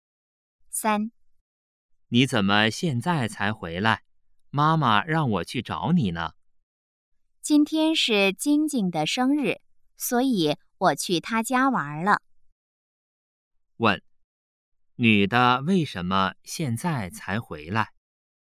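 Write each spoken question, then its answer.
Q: 问,女的为什么现在才回来?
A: 今天是晶晶的生日,她去晶晶家玩了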